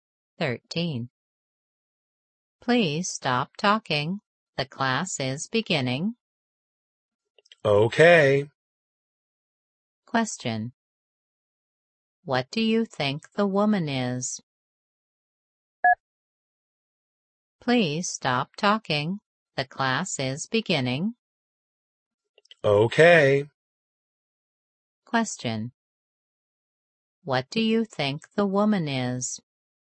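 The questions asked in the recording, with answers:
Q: What do you think the woman is?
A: A teacher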